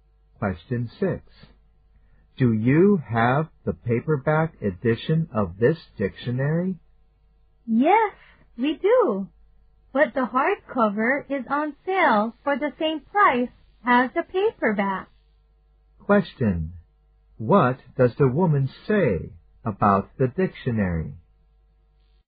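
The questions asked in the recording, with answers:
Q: What does the woman say about the dictionary?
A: The hardcover is on sale for the same price as the paperback.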